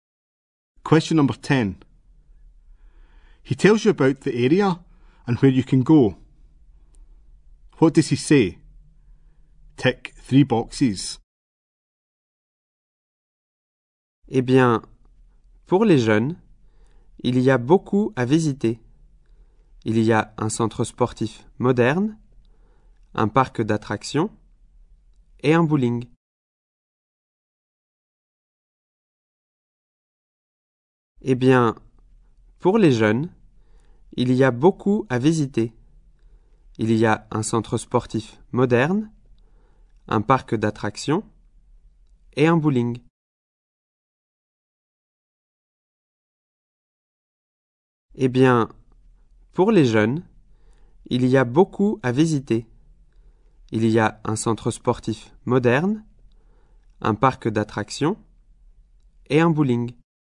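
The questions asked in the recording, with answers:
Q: What does he say?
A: There is a modern sports centre, a theme park and a bowling alley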